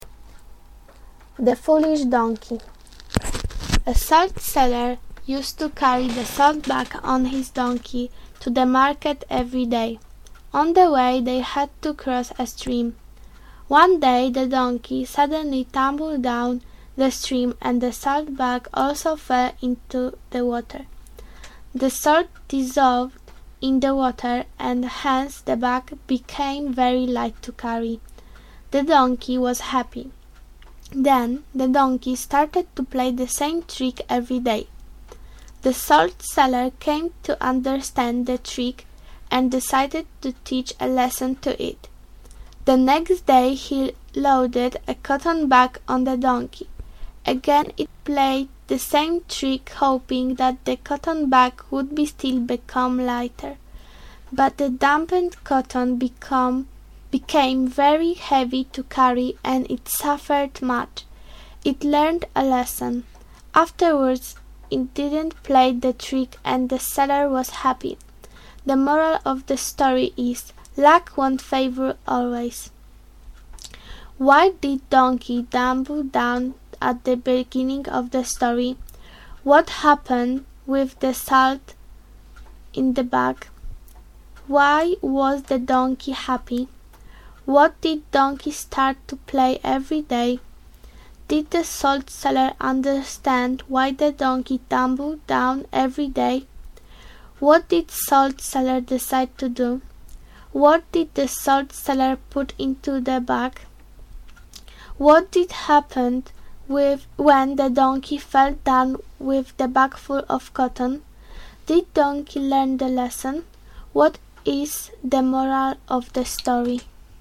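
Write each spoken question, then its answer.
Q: What happened with the salt in the bag?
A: It dissolved in the water

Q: Why was the donkey happy?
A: The bag became very light to carry

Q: What did donkey start to play every day?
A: The same trick of falling into the stream

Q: Did the salt seller understand why the donkey tumbled down every day?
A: Yes

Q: What did salt seller decide to do?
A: Teach the donkey a lesson

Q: What did the salt seller put into the bag?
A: Cotton

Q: What did happen when the donkey fell down with the bag full of cotton?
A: The wet cotton became very heavy and the donkey suffered

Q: Did donkey learn the lesson?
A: Yes

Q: What is the moral of the story?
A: Luck won't favor always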